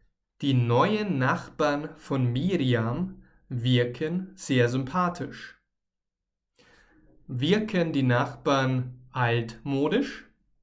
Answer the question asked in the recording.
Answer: Nein, Sie wirken nicht altmodisch.